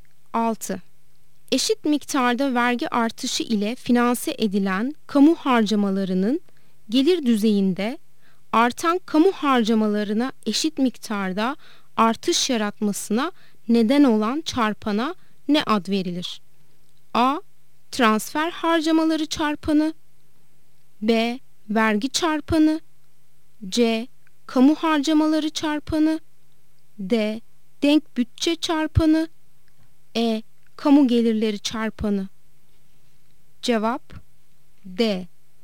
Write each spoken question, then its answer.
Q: Eşit miktarda vergi artışı ile finanse edilen kamu harcamalarının gelir düzeyinde artan kamu harcamalarına eşit miktarda artış yaratmasına neden olan çarpana ne ad verilir?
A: Cevap D. Denk bütçe çarpanı.